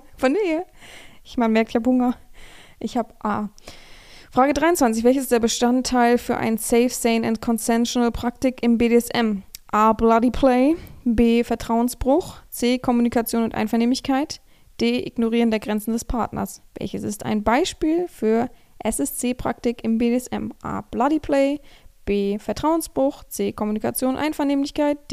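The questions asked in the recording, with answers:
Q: Welches ist der Bestandteil für ein Safe, Sane and Consensual Praktik im BDSM?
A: C: Kommunikation und Einvernehmlichkeit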